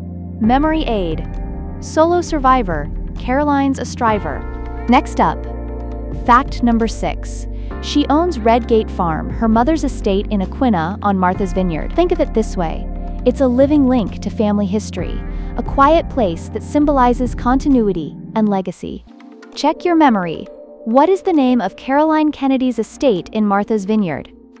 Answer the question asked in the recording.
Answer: Redgate Farm.